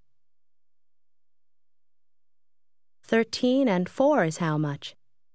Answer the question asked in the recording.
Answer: 17.